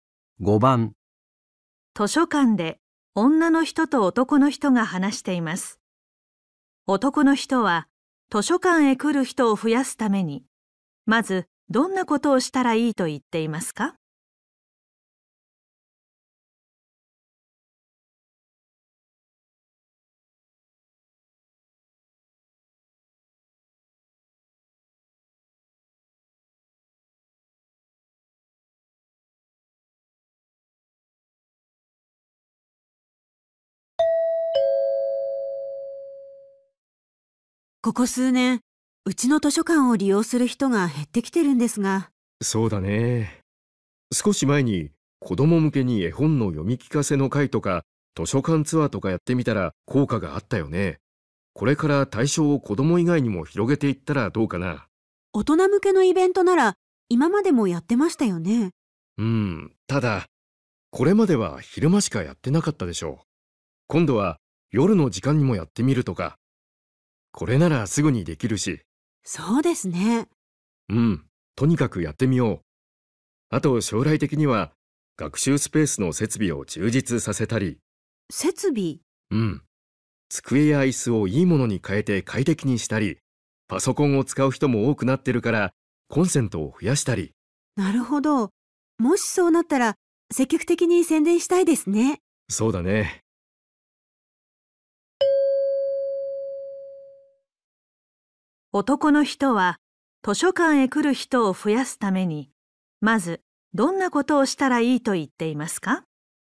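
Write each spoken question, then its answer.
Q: 男の人は図書館へ来る人を増やすためにまずどんなことをしたらいいと言っていますか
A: 大人向けのイベントを夜の時間にもやる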